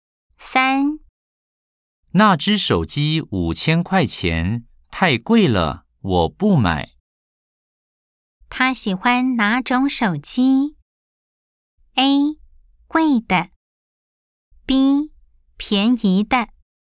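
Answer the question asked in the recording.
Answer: B: 便宜的。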